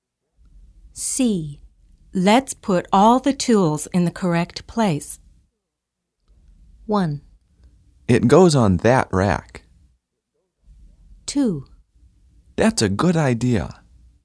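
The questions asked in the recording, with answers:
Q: Let's put all the tools in the correct place.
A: 2: That's a good idea.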